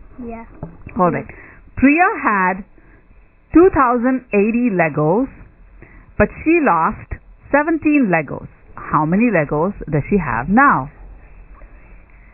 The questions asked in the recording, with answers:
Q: How many Legos does she have now?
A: 2,063.